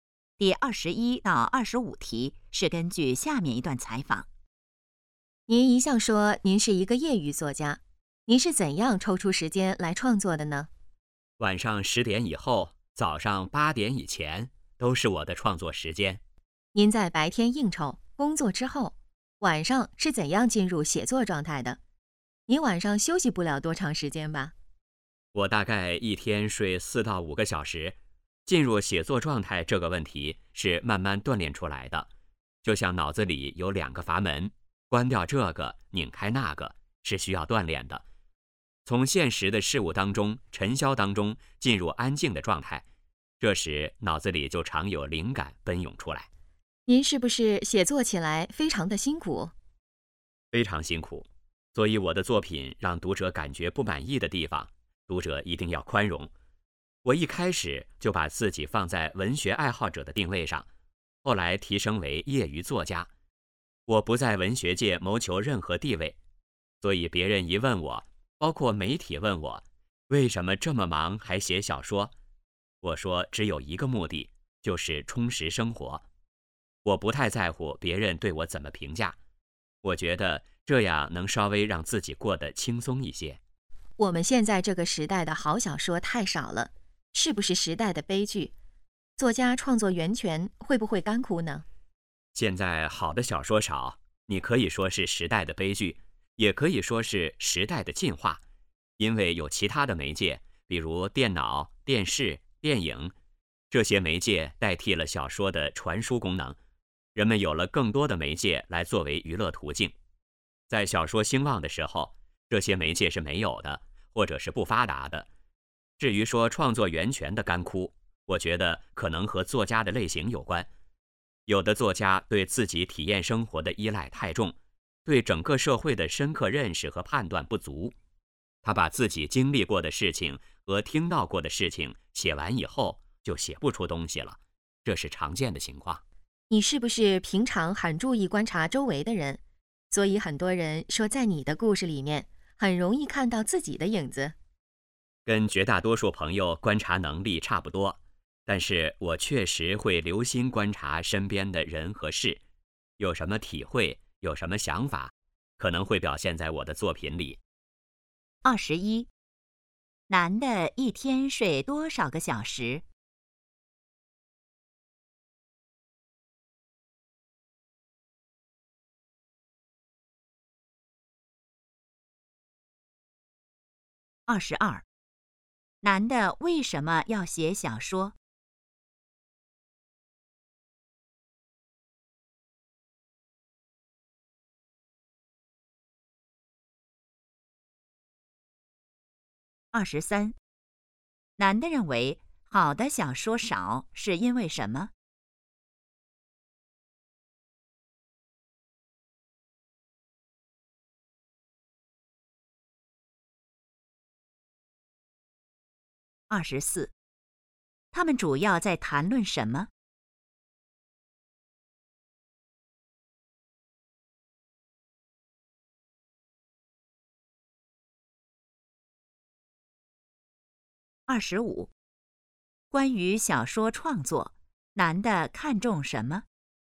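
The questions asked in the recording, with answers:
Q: 男的一天睡多少个小时?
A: 四到五个小时

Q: 男的为什么要写小说?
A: 为了充实生活

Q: 男的认为好的小说少是因为什么?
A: 其他媒介代替了小说的传输功能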